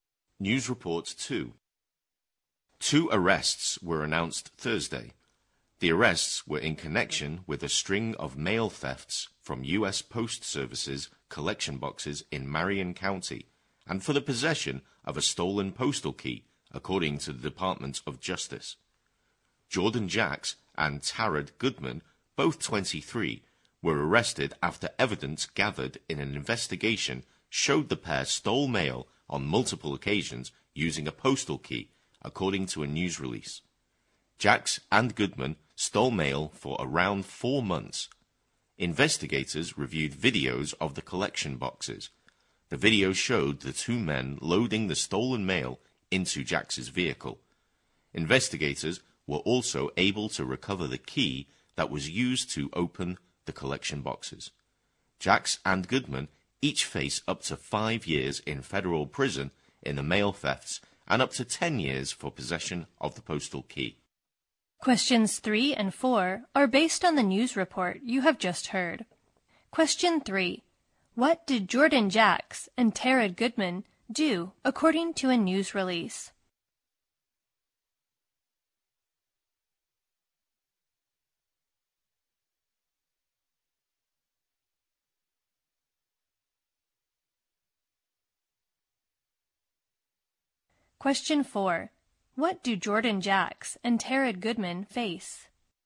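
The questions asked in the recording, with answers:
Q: What did Jordan Jacks and Tarad Goodman do according to a news release?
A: They stole mail from postal collection boxes many times using a postal key.

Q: What do Jordan Jacks and Tarad Goodman face?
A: Up to 5 years in federal prison for the mail thefts and up to 10 years for having the postal key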